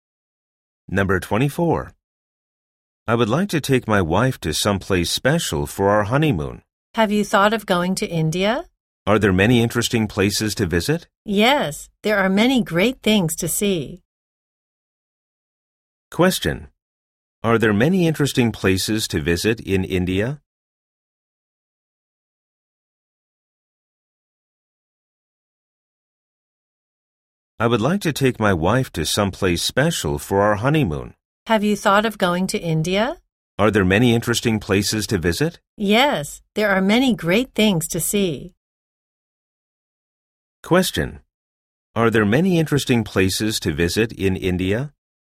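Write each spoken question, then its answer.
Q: Are there many interesting places to visit in India?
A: Yes, there are many great things to see.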